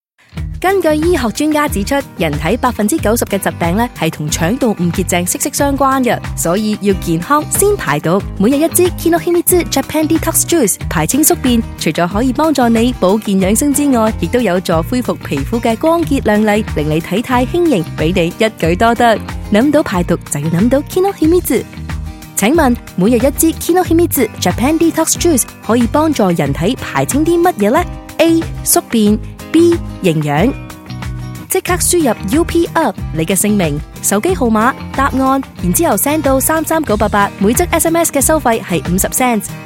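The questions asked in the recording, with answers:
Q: 请问每日一支 Kinohimitsu Japan Detox Juice 可以帮助人体排清啲乜嘢呢?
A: A: 宿便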